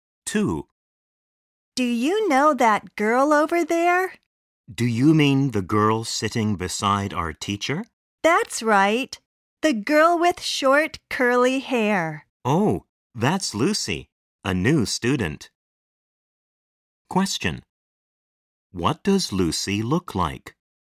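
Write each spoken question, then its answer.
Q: What does Lucy look like?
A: She has short, curly hair.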